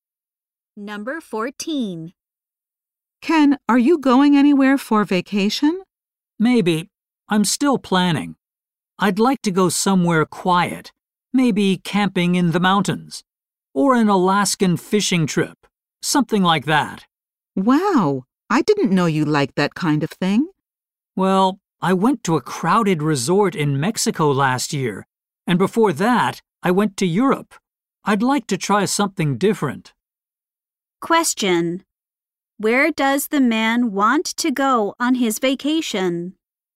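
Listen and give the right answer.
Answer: Somewhere quiet, like camping in the mountains.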